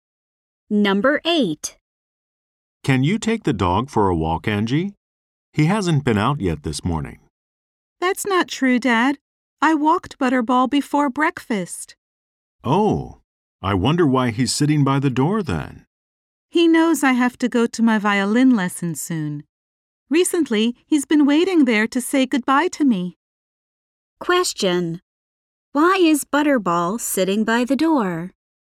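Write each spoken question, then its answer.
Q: Why is Butterball sitting by the door?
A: He is waiting to say goodbye to Angie before her violin lesson.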